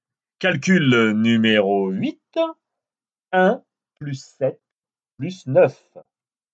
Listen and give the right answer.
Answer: Dix-sept.